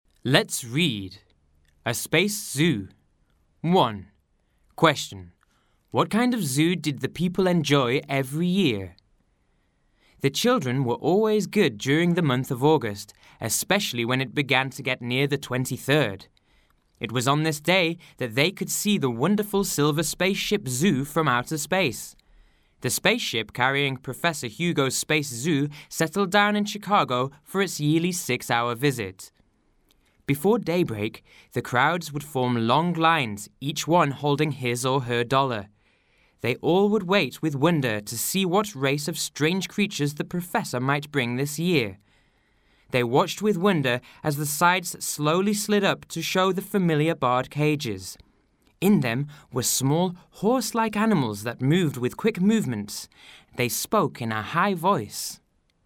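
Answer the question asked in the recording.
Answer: A space zoo from outer space (Professor Hugo's spaceship zoo)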